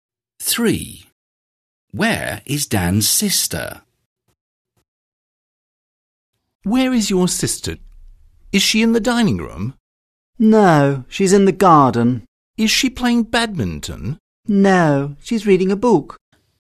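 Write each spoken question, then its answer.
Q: Where is Dan's sister?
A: In the garden, reading a book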